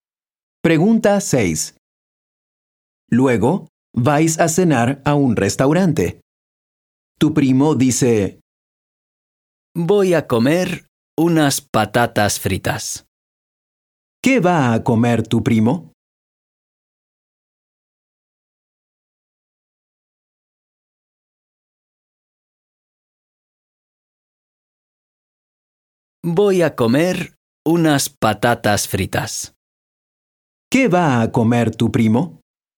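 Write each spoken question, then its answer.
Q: ¿Qué va a comer tu primo?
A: Unas patatas fritas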